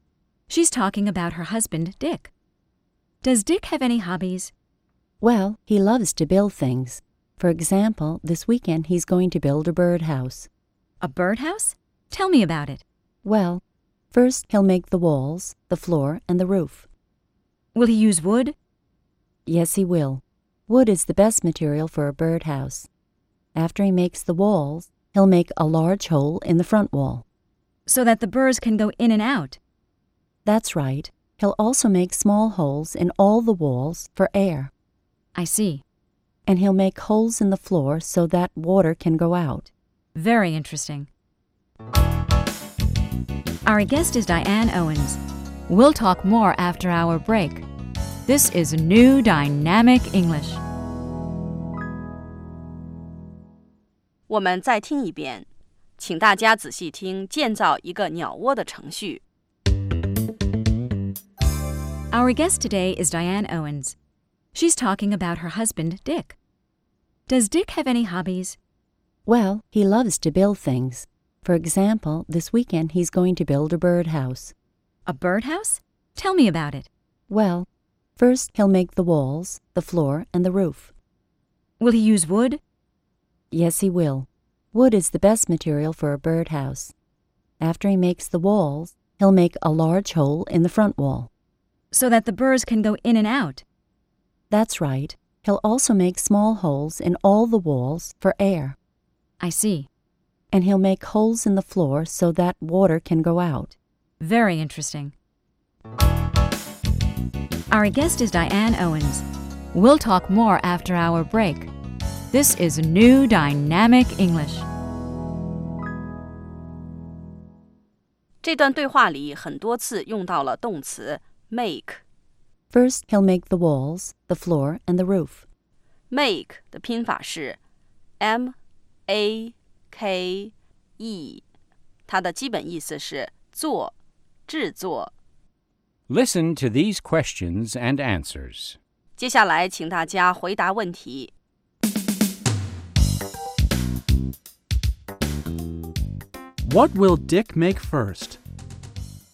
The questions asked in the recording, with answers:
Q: What will Dick make first?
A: First,He'll make the walls, the floor, and the roof.